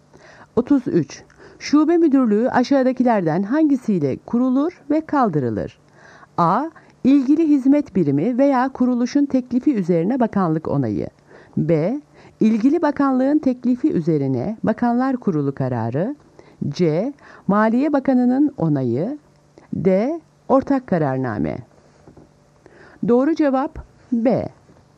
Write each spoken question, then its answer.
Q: Şube müdürlüğü aşağıdakilerden hangisiyle kurulur ve kaldırılır?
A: Doğru cevap B. İlgili bakanlığın teklifi üzerine bakanlar kurulu kararı.